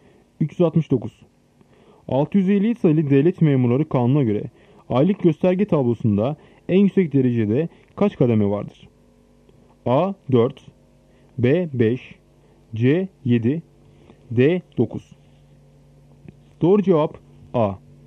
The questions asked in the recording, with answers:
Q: 650 sayılı Devlet Memurları Kanunu'na göre aylık gösterge tablosunda en yüksek derecede kaç kademe vardır?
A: Doğru cevap A. 4.